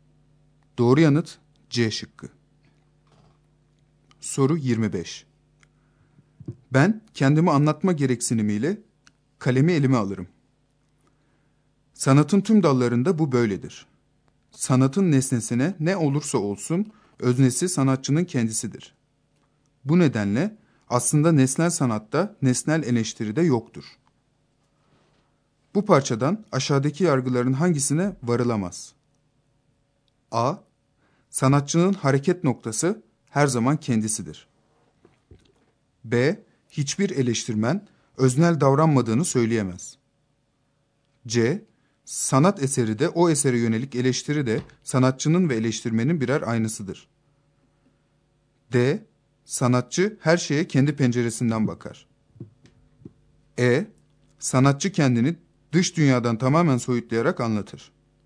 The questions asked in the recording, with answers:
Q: Bu parçadan aşağıdaki yargıların hangisine varılamaz?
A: Doğru yanıt E şıkkı.